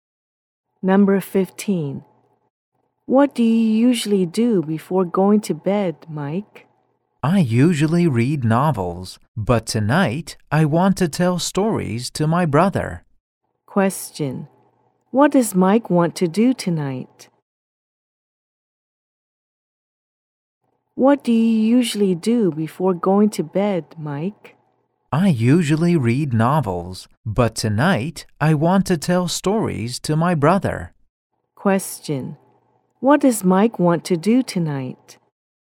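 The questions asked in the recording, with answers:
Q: What does Mike want to do tonight?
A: Tell stories to his brother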